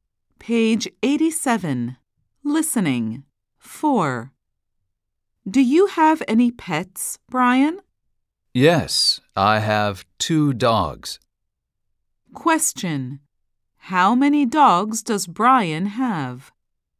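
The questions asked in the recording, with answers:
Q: How many dogs does Brian have?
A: Two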